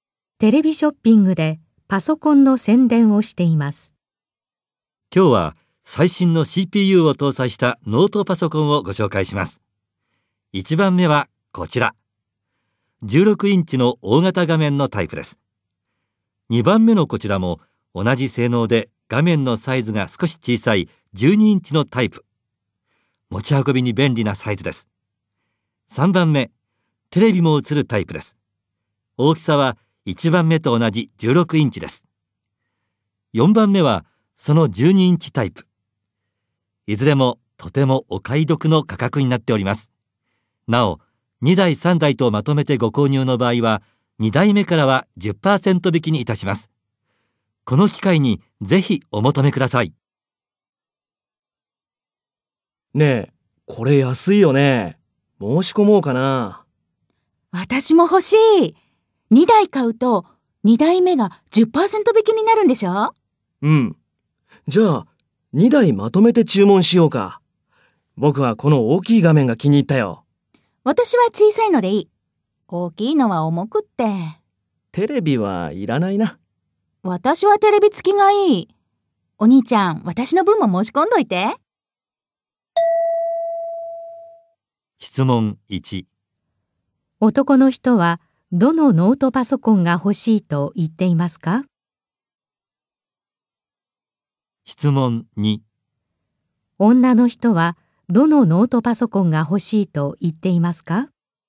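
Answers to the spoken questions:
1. 1番目(16インチ、テレビなし)
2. 4番目(12インチ、テレビ付き)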